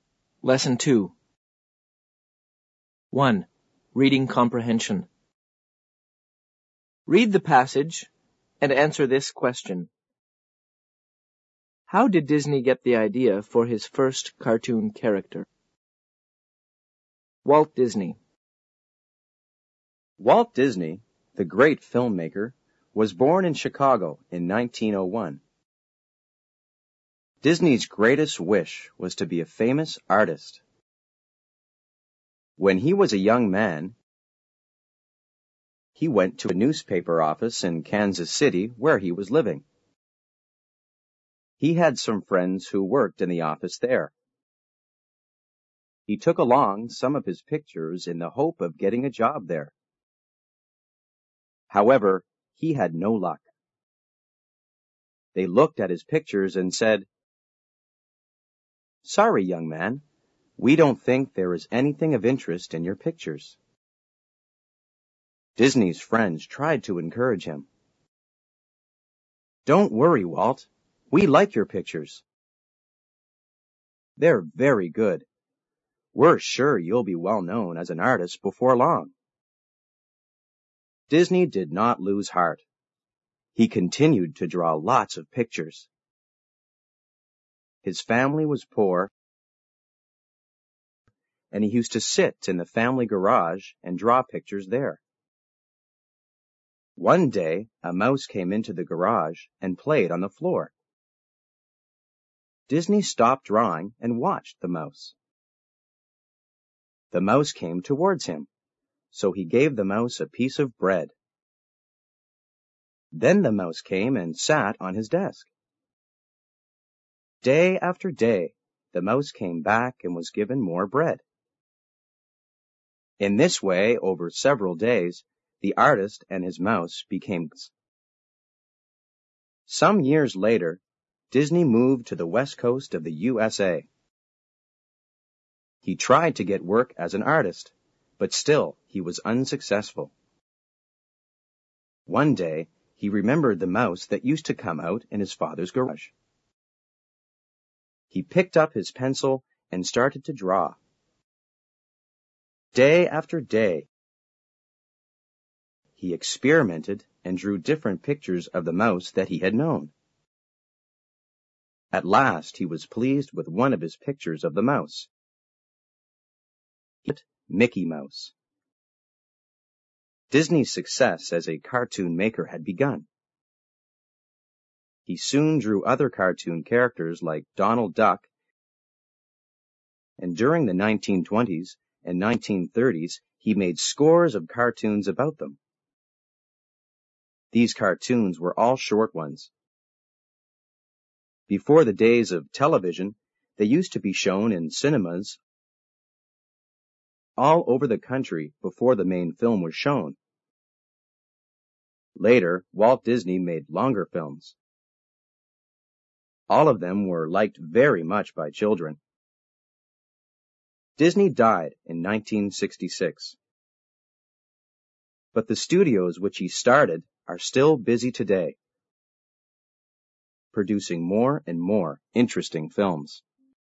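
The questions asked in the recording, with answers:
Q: How did Disney get the idea for his first cartoon character?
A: He remembered a mouse that used to come into his family's garage, where he fed it and made friends with it.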